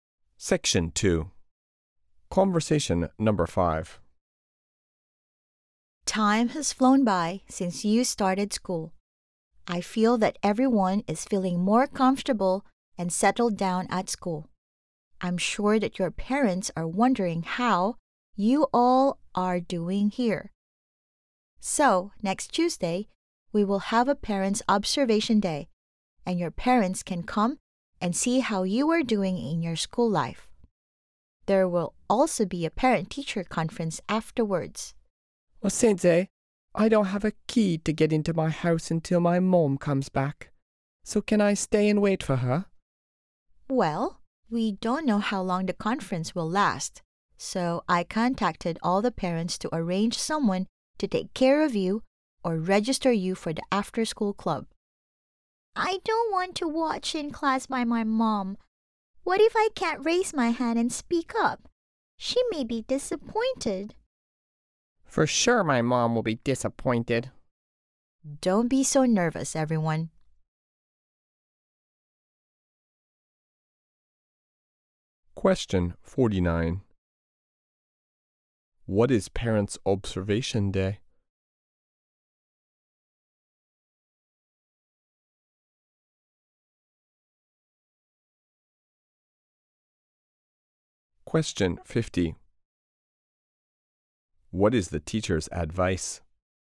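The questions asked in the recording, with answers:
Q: What is Parents' Observation Day?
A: A day next Tuesday when parents come to school to see how their children are doing

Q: What is the teacher's advice?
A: Don't be so nervous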